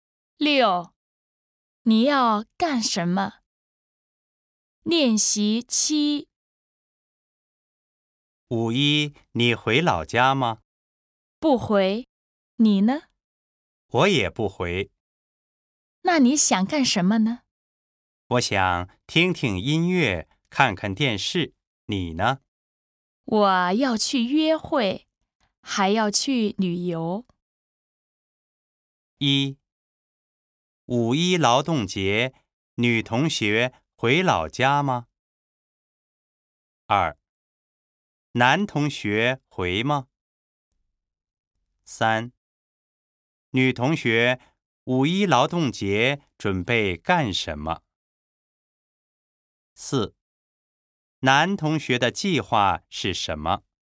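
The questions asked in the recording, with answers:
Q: 五一劳动节,女同学回老家吗?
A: 不回

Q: 男同学回吗?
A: 不回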